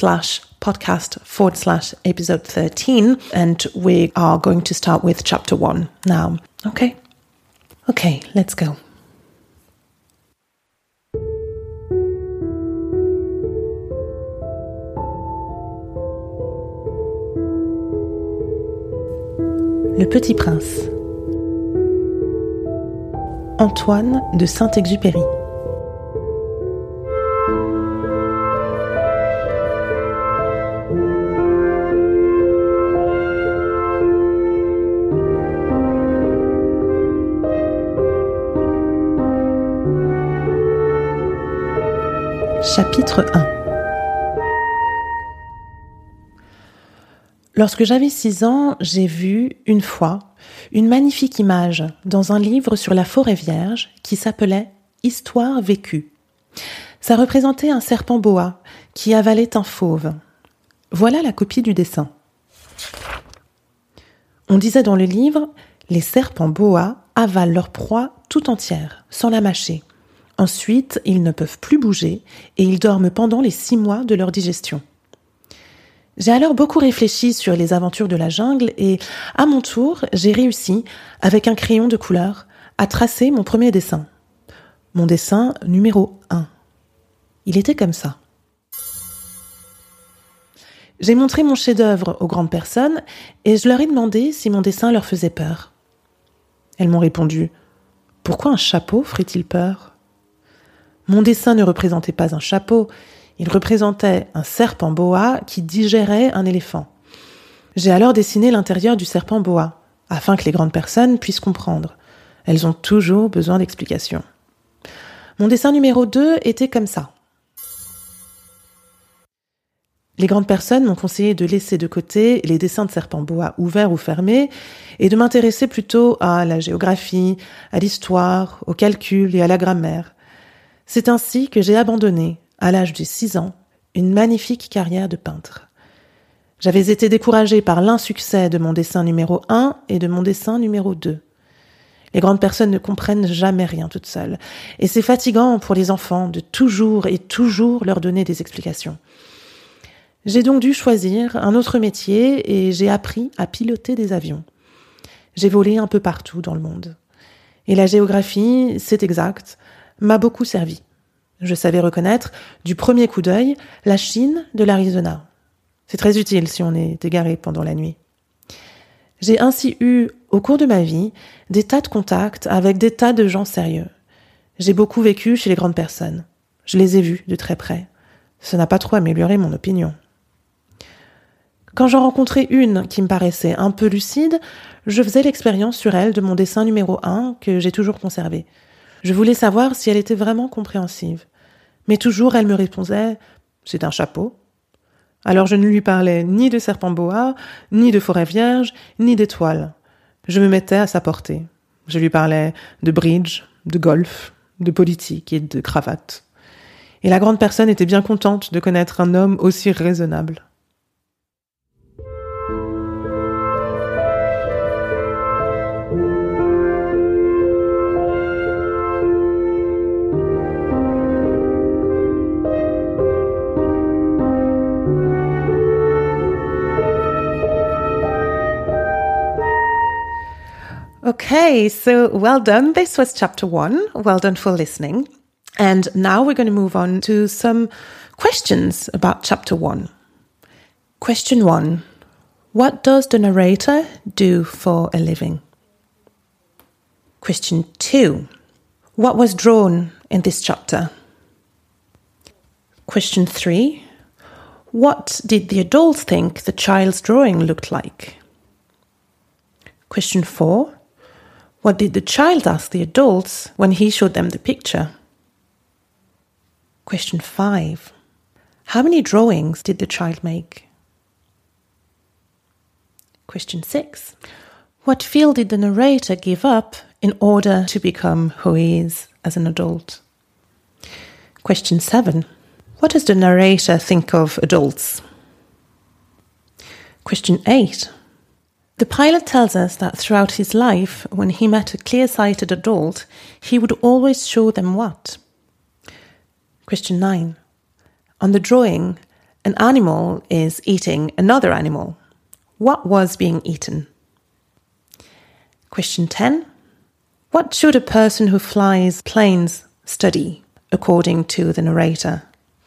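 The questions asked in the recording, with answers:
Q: What does the narrator do for a living?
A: He is a pilot (flies planes)

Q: What did the adults think the child's drawing looked like?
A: A hat

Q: What did the child ask the adults when he showed them the picture?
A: Whether his drawing frightened them

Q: How many drawings did the child make?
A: Two

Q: What field did the narrator give up in order to become who he is as an adult?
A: Painting (a career as a painter)

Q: What does the narrator think of adults?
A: They never understand anything by themselves and always need explanations

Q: The pilot tells us that throughout his life, when he met a clear-sighted adult, he would always show them what?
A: His drawing number 1

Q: On the drawing, an animal is eating another animal. What was being eaten?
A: An elephant

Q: What should a person who flies planes study, according to the narrator?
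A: Geography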